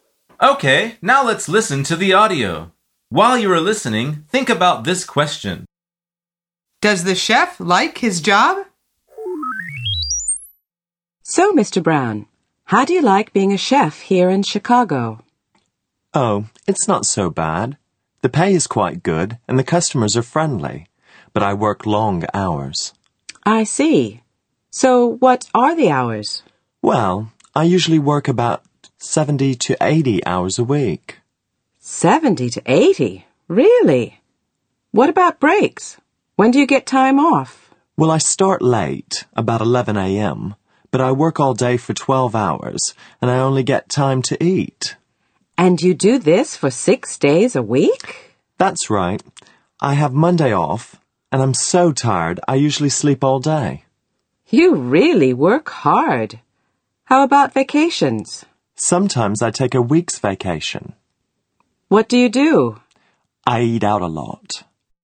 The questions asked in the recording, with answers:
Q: Does the chef like his job?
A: The answer is yes. He says it's not so bad.